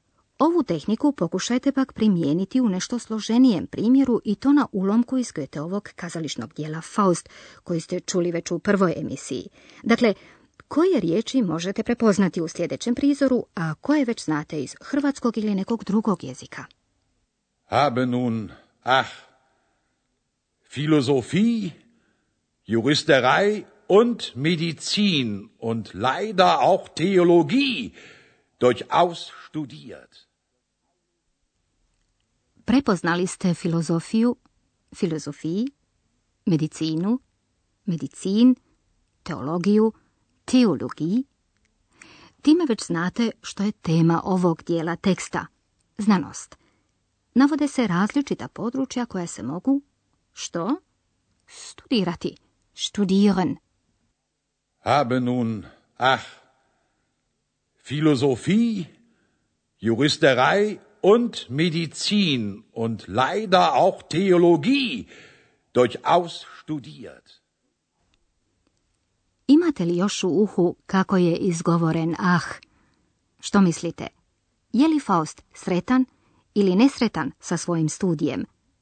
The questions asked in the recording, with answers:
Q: Dakle, koje riječi možete prepoznati u sljedećem prizoru, a koje već znate iz hrvatskog ili nekog drugog jezika.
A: Prepoznali ste filozofiju, filozofiji, medicinu, medicin, teologiju, teologiji